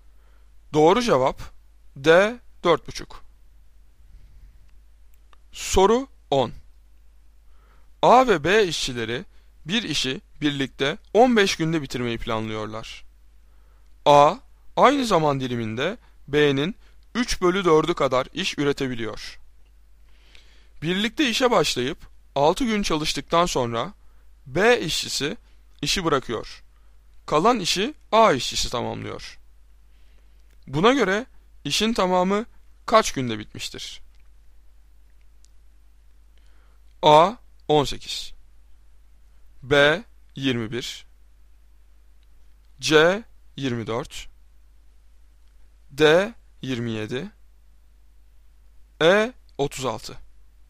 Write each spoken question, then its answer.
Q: Buna göre işin tamamı kaç günde bitmiştir?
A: Doğru cevap D 27.